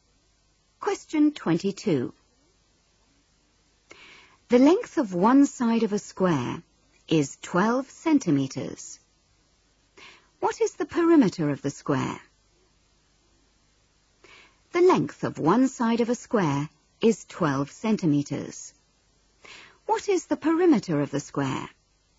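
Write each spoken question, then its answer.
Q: What is the perimeter of the square?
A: 48 centimetres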